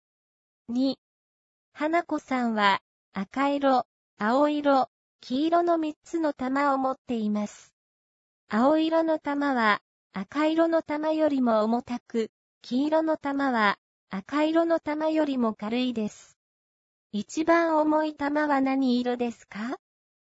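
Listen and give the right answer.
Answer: 青色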